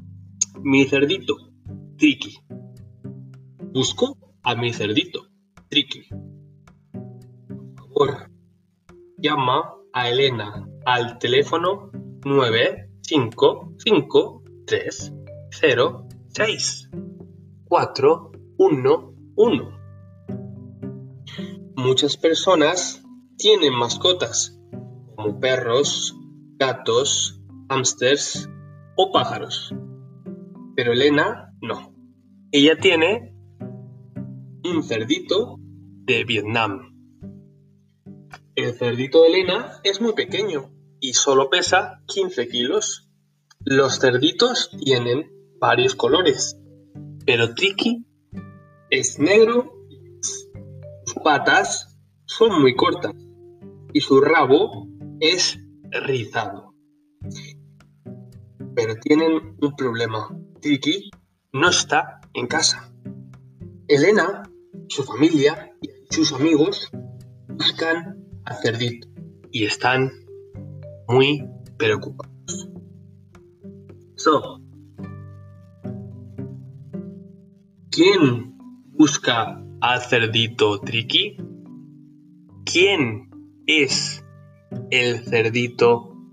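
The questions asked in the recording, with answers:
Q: ¿quién busca al Cerdito Triqui?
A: Elena, su familia y sus amigos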